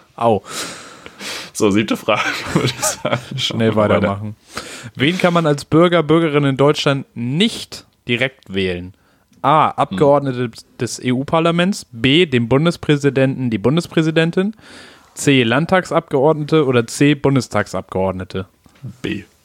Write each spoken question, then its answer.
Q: Wen kann man als Bürger, Bürgerin in Deutschland nicht direkt wählen?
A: B, dem Bundespräsidenten.